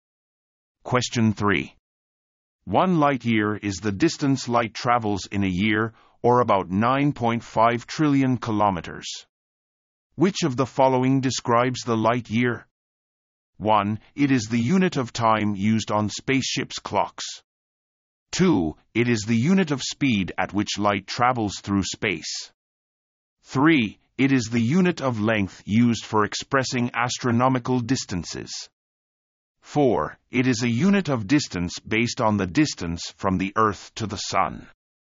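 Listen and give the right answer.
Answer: 3: It is the unit of length used for expressing astronomical distances.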